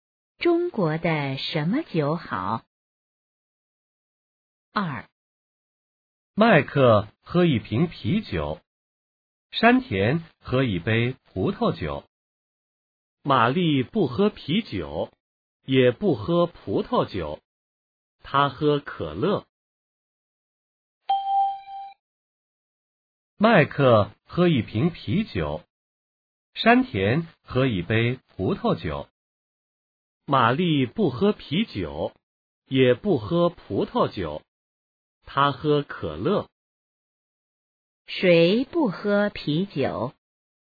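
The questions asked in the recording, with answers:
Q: 谁不喝啤酒?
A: 玛丽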